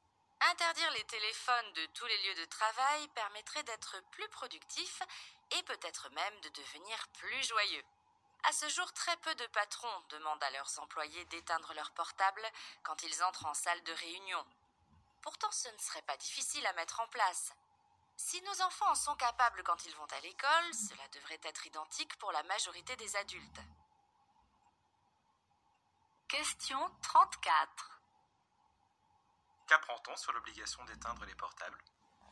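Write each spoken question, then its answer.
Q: Qu'apprend-on sur l'obligation d'éteindre les portables ?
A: Très peu de patrons l'imposent à leurs employés en réunion.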